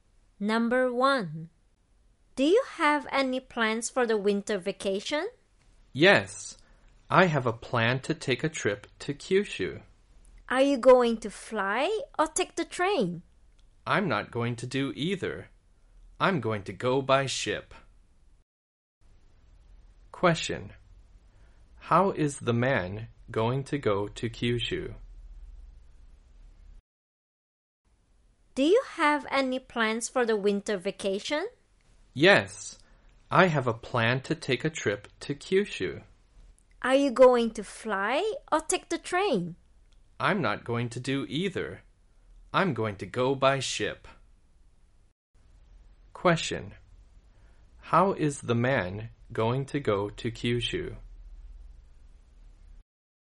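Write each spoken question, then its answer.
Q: How is the man going to go to Kyushu?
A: By ship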